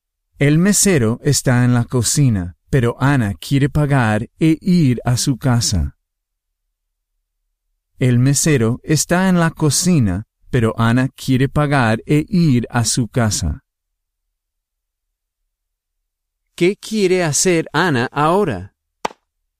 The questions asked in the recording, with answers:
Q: ¿Qué quiere hacer Ana ahora?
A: Ella quiere pagar e ir a su casa.